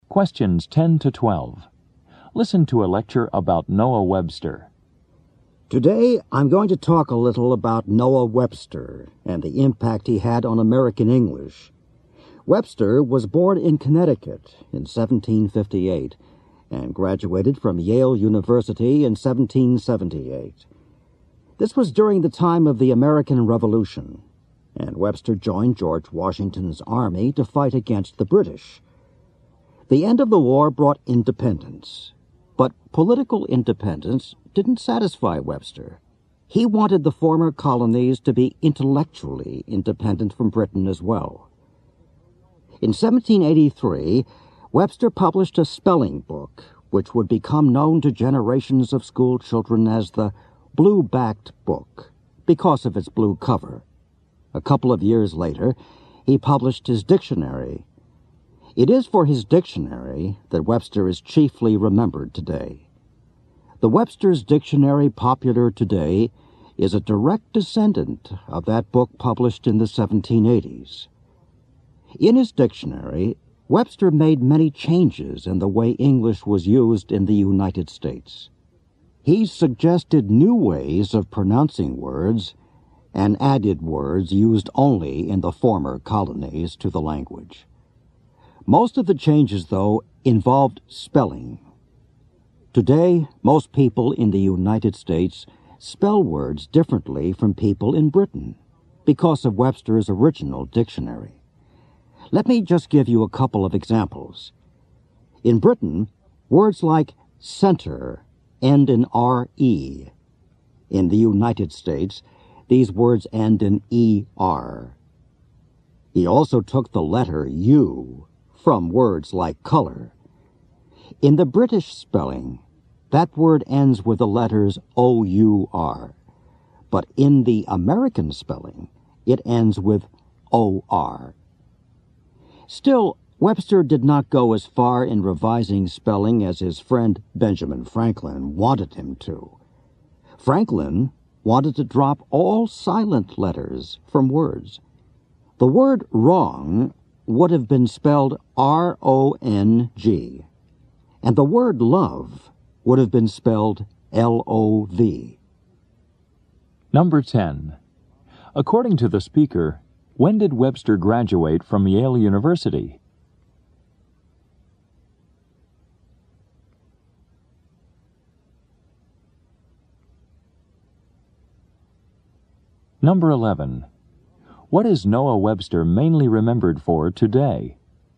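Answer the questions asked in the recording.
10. In 1778
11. His dictionary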